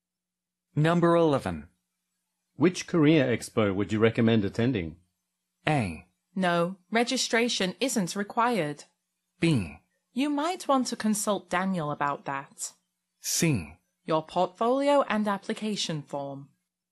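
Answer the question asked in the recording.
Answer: B: You might want to consult Daniel about that.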